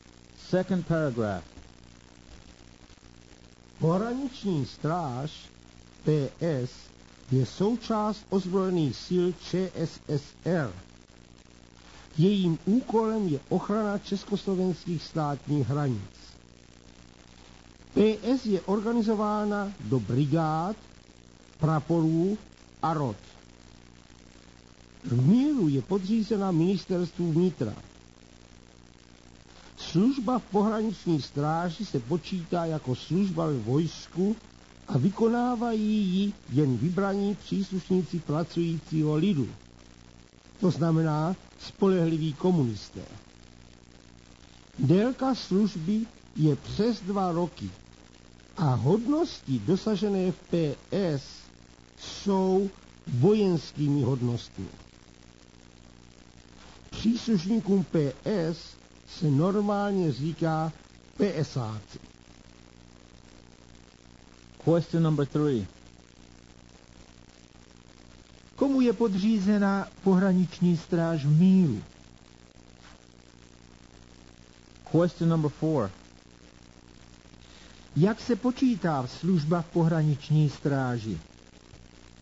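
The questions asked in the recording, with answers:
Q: Komu je podřízena pohraniční stráž v míru?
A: Ministerstvu vnitra

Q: Jak se počítá služba v pohraniční stráži?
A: Jako služba ve vojsku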